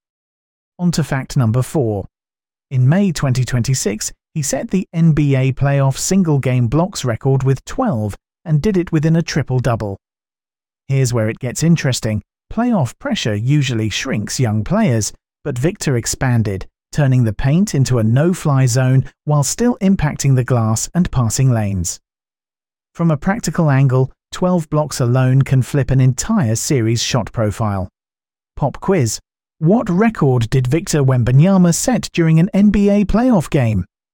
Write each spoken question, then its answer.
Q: What record did Victor Wembanyama set during an NBA playoff game?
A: Correct answer. Most blocks in a single game with 12.